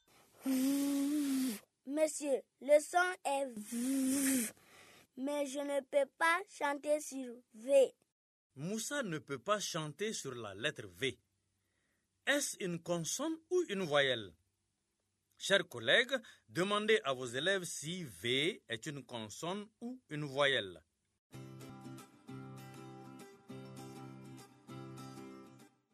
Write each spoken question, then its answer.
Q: Est-ce une consonne ou une voyelle?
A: est une consonne.